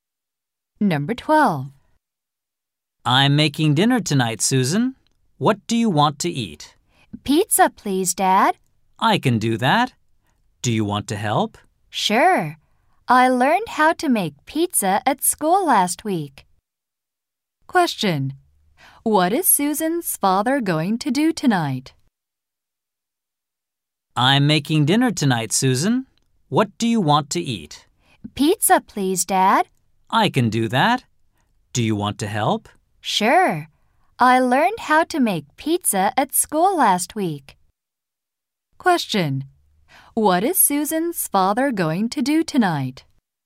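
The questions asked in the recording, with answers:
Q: Question. What is Susan's father going to do tonight?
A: Make pizza for dinner.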